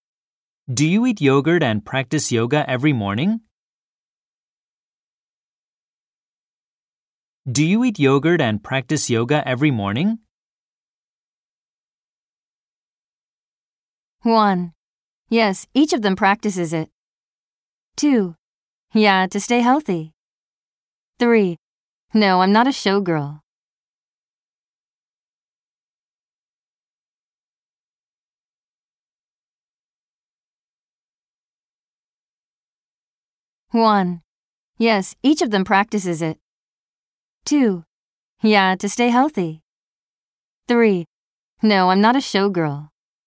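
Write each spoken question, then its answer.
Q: Do you eat yogurt and practice yoga every morning?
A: 2: Yeah, to stay healthy.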